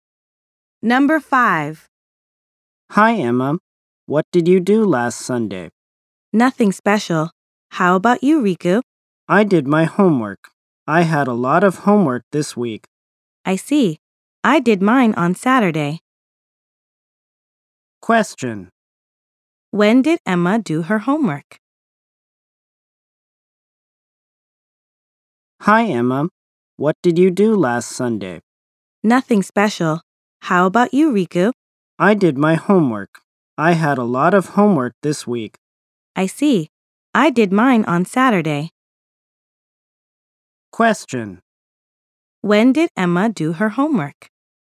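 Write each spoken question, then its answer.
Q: When did Emma do her homework?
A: On Saturday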